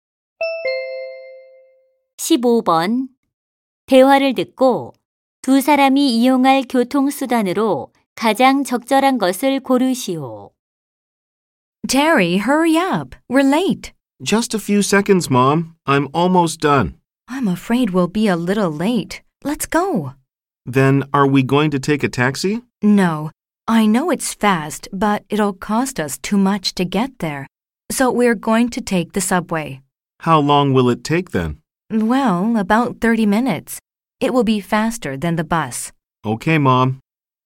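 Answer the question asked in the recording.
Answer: 지하철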